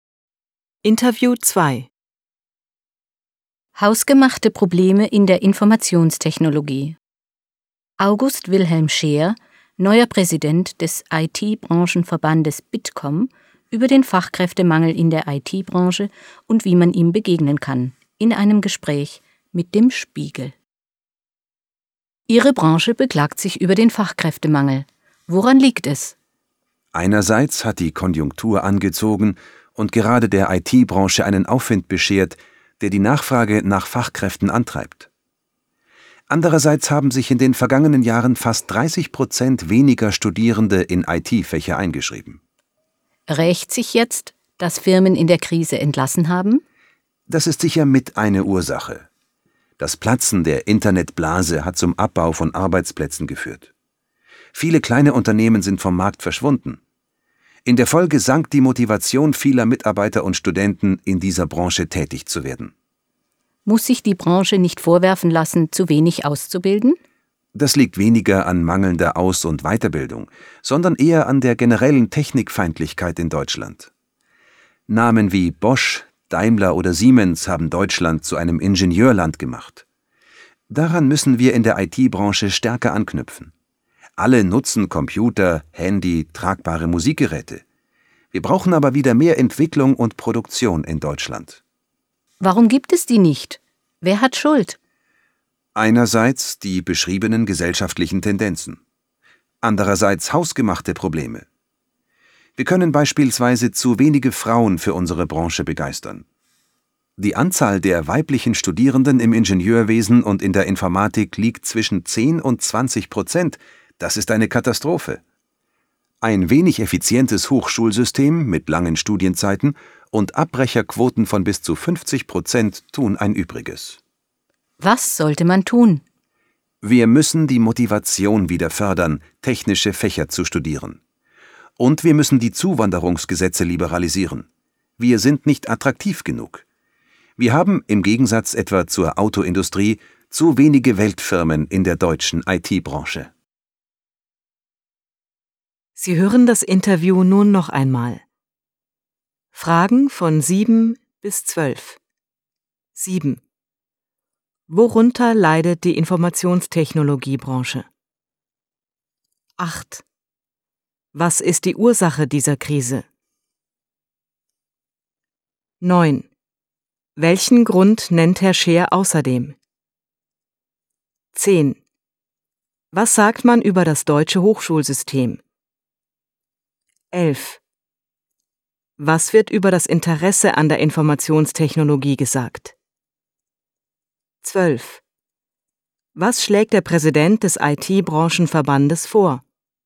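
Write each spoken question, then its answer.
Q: Worunter leidet die Informationstechnologiebranche?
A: Unter Fachkräftemangel

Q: Was sagt man über das deutsche Hochschulsystem?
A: Wenig effizient, lange Studienzeiten, Abbrecherquoten bis 50%

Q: Was schlägt der Präsident des IT-Branchenverbandes vor?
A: Motivation für technische Fächer fördern und Zuwanderungsgesetze liberalisieren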